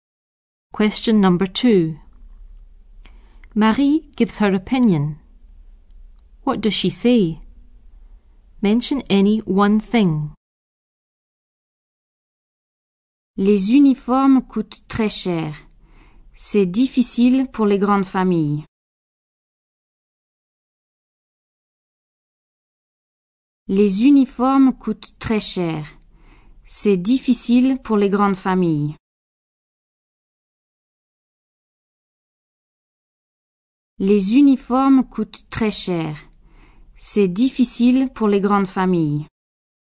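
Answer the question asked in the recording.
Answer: Uniforms are very expensive; it's difficult for big families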